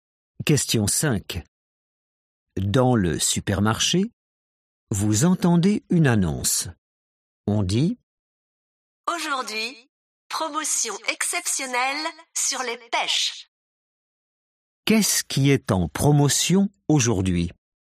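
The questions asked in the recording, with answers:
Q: Qu'est-ce qui est en promotion aujourd'hui?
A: les pêches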